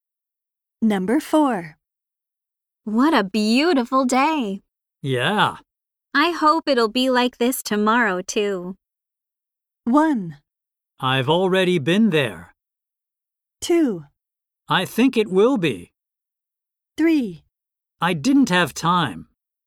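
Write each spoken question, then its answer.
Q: I hope it'll be like this tomorrow, too.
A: 2: I think it will be.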